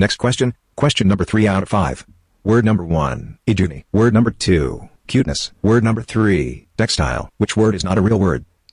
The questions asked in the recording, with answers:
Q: Which word is not a real word?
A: Lie was word number 1.